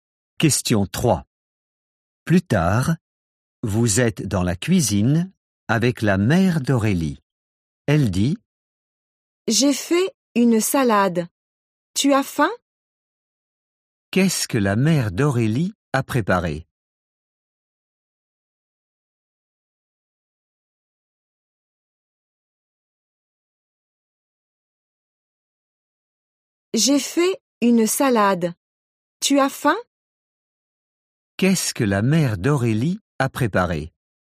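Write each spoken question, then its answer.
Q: Qu'est-ce que la mère d'Aurélie a préparé?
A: Une salade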